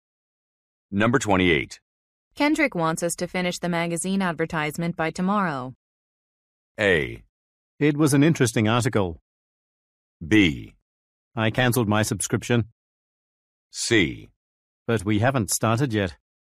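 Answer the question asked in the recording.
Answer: C: But we haven't started yet.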